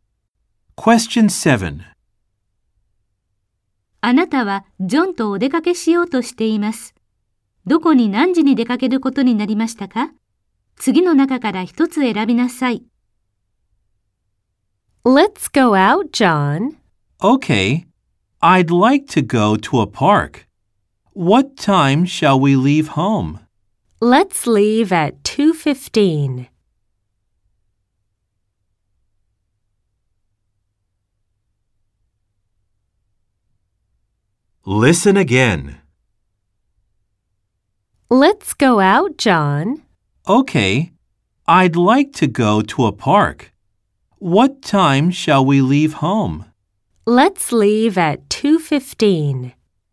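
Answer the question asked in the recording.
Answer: 公園に2時15分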